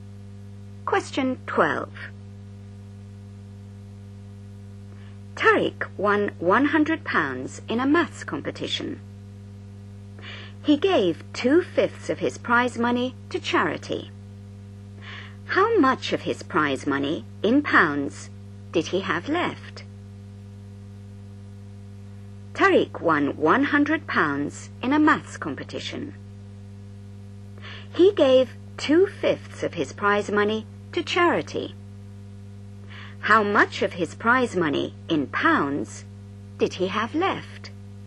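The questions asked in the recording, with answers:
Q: How much of his prize money, in pounds, did he have left?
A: £60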